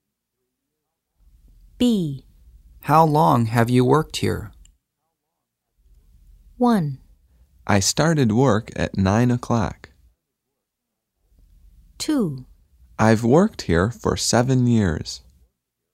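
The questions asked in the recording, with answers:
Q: How long have you worked here?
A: 2: I've worked here for 7 years.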